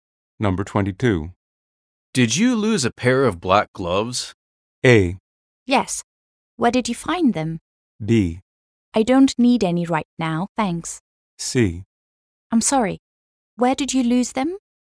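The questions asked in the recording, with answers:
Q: Did you lose a pair of black gloves?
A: A: Yes. Where did you find them?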